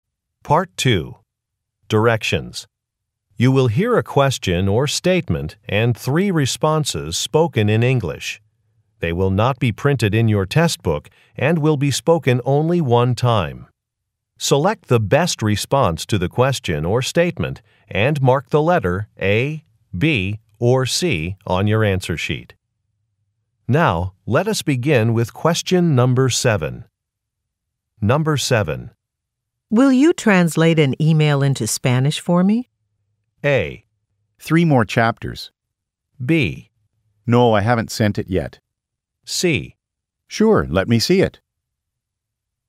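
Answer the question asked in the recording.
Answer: C. Sure, let me see it.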